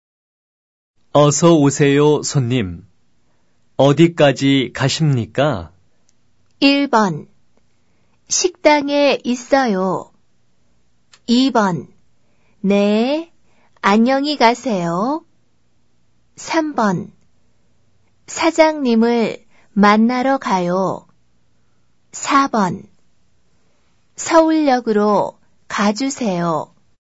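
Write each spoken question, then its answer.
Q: 어디까지 가십니까?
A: 4: 서울역으로 가주세요.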